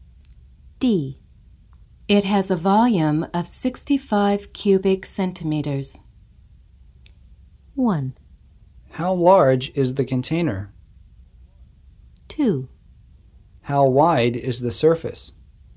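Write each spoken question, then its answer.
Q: It has a volume of 65 cubic centimeters.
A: 1: How large is the container?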